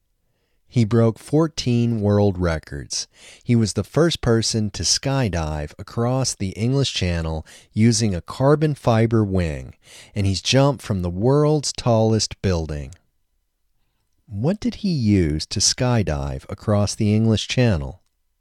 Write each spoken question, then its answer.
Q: What did he use to skydive across the English Channel?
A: He used a carbon fiber wing to skydive across the English Channel.